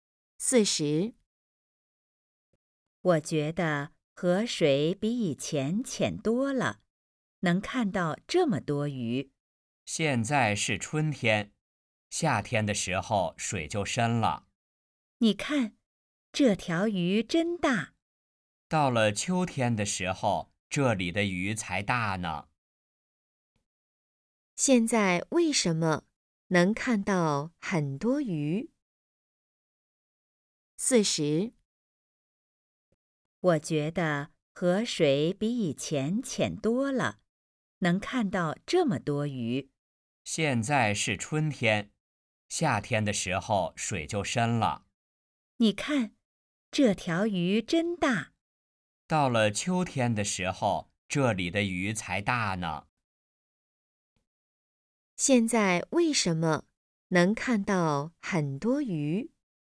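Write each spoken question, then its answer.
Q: 现在为什么能看到很多鱼?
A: 河水浅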